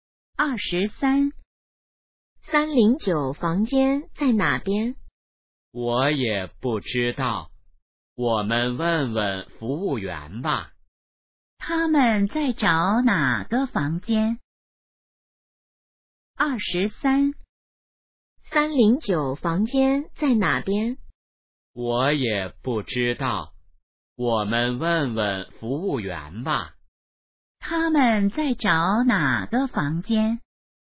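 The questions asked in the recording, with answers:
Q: 他们在找哪个房间?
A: 309房间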